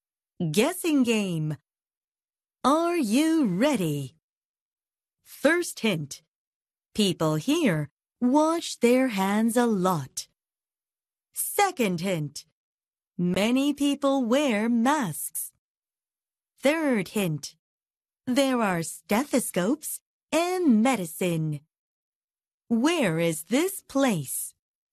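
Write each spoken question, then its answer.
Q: Where is this place?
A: A hospital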